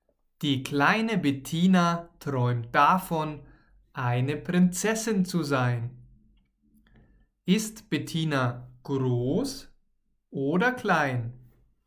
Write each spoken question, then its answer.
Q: Ist Bettina groß oder klein?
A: Sie ist klein. Bettina ist klein.